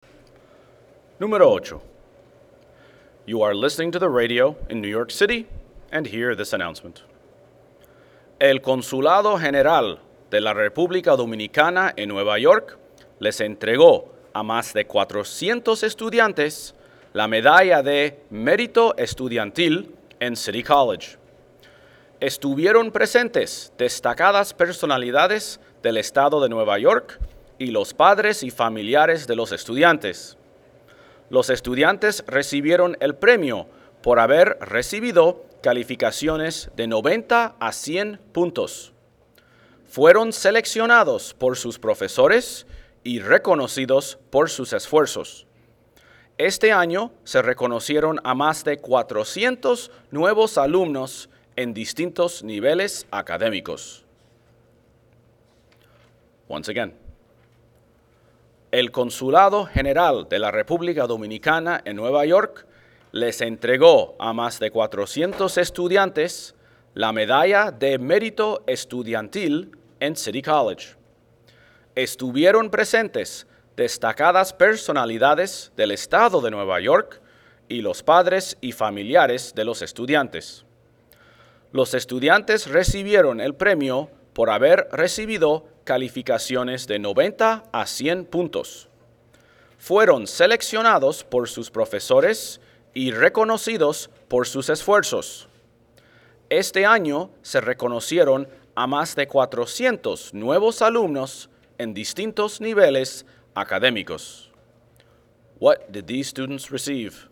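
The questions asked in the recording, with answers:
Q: What did these students receive?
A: A student merit medal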